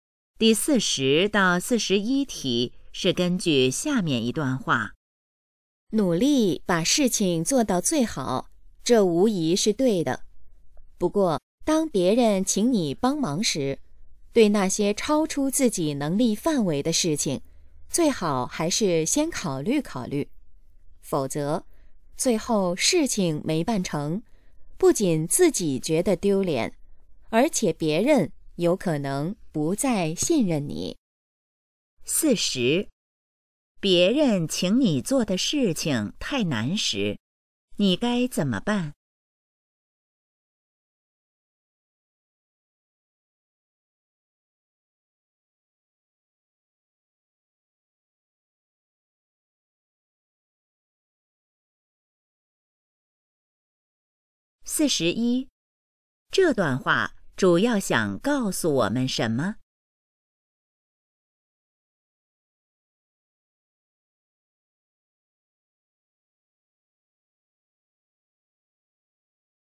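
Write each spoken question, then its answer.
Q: 别人请你做的事情太难时,你该怎么办?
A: 先考虑考虑

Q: 这段话主要想告诉我们什么?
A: 超出能力的事要慎重答应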